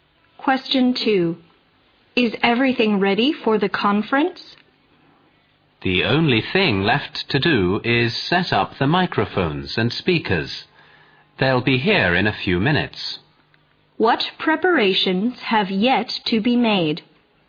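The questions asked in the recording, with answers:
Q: What preparations have yet to be made?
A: Setting up the microphones and speakers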